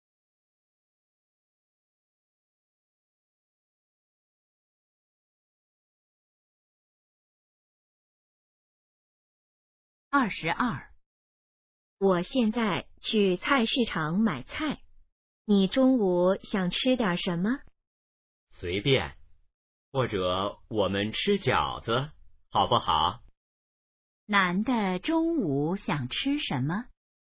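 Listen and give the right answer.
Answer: 饺子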